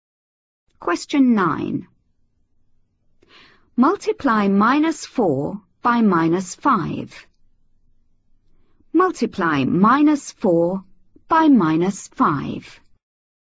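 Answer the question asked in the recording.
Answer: 20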